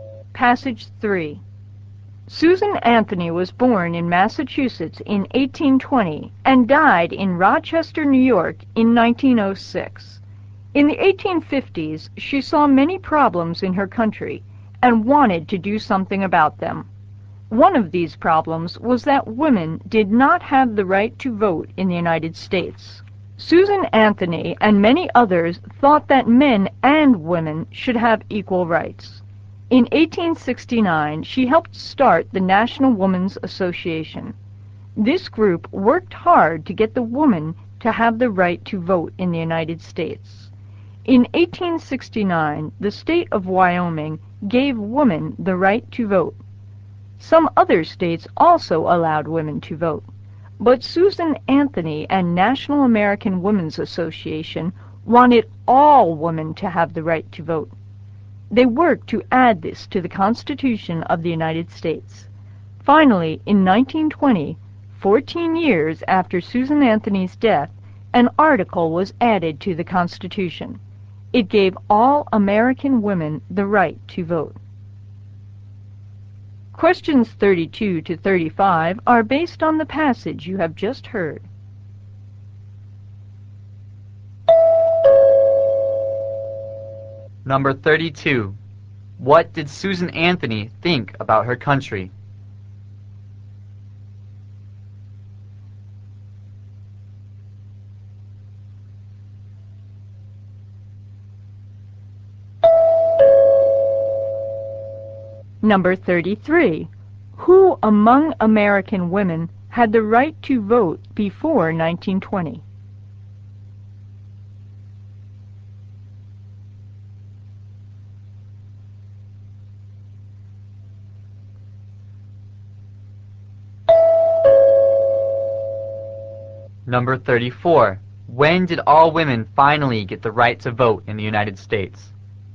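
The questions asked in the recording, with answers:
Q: Who among American women had the right to vote before 1920?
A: Women in Wyoming and some other states

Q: When did all women finally get the right to vote in the United States?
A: In 1920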